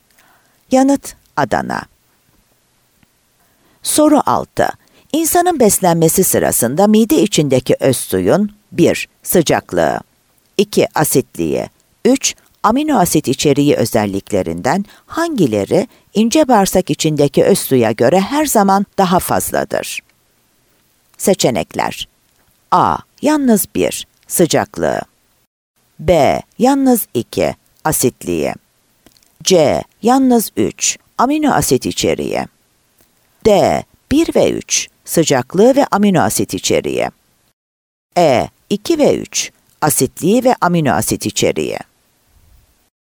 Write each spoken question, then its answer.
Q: amino asit içeriği özelliklerinden hangileri ince bağırsak içindeki öz suya göre her zaman daha fazladır?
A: Bursa